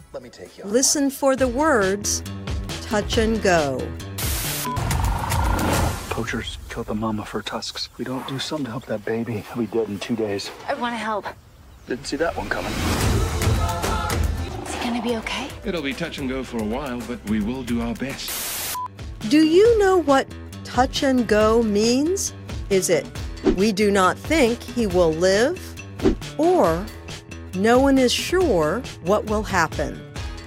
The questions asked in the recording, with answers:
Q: Do you know what touch and go means?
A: The answer is B.